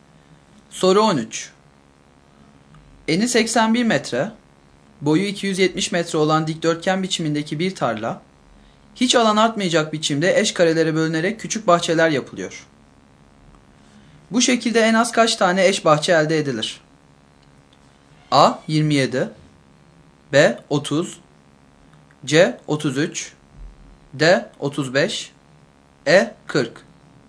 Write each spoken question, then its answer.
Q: Bu şekilde en az kaç tane eş bahçe elde edilir?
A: Doğru yanıt B şıkkı.